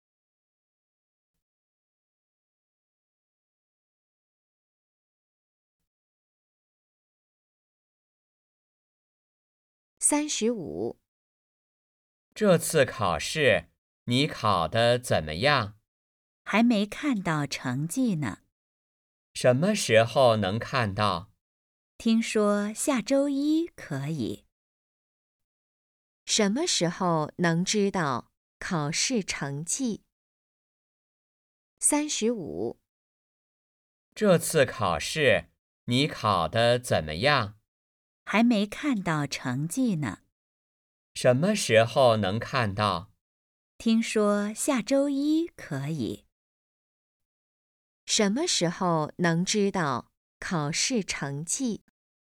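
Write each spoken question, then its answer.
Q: 什么时候能知道考试成绩?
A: 下周一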